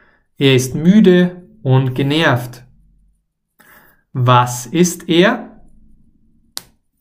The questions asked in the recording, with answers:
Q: Was ist er?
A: Müde und genervt. Er ist müde und genervt.